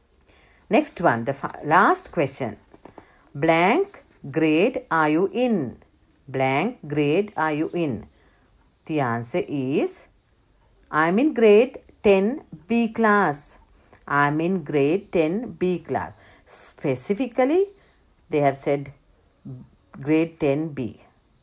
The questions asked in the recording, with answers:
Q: Blank grade are you in? Blank grade are you in?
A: Which grade are you in?